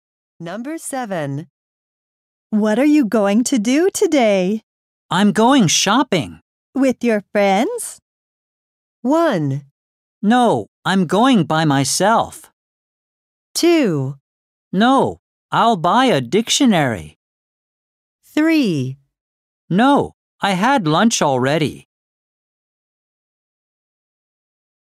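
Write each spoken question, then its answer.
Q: With your friends?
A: 1: No, I'm going by myself.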